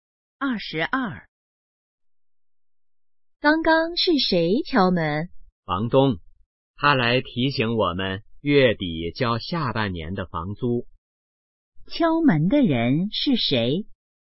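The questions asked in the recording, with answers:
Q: 敲门的人是谁?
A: 房东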